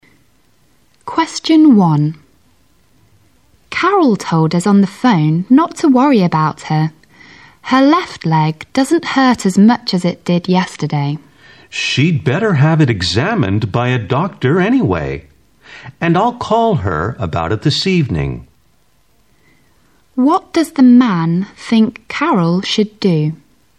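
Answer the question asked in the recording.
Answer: Have her leg examined by a doctor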